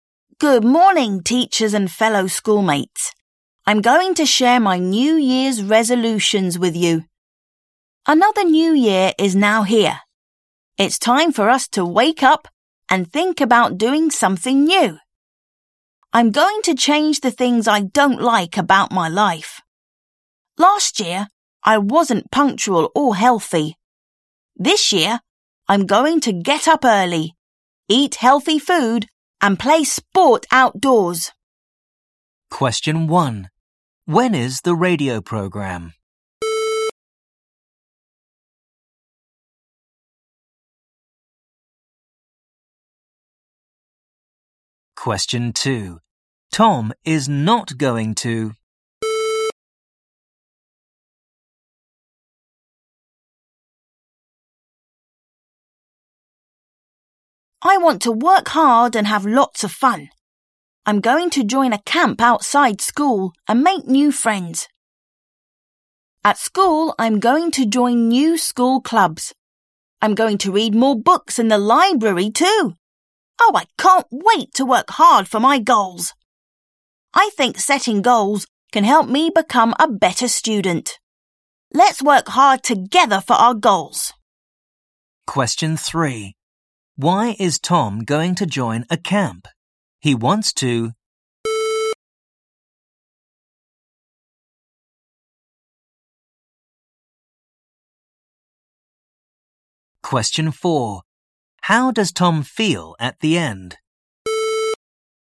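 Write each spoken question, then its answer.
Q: When is the radio program?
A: In the morning

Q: Why is Tom going to join a camp?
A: He wants to make new friends.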